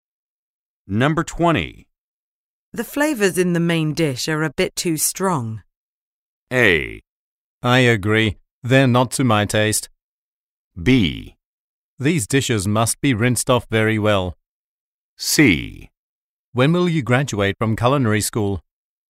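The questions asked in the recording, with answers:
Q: The flavors in the main dish are a bit too strong.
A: A: I agree. They're not to my taste.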